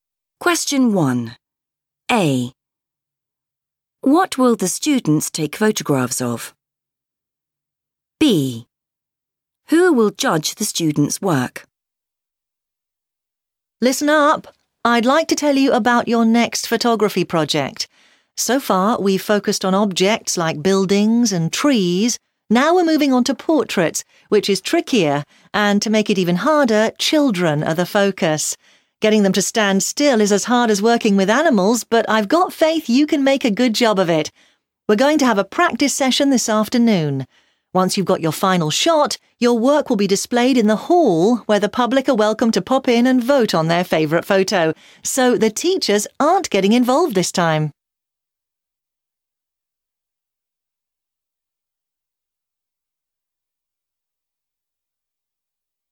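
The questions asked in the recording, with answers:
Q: What will the students take photographs of?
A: children

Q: Who will judge the students' work?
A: the public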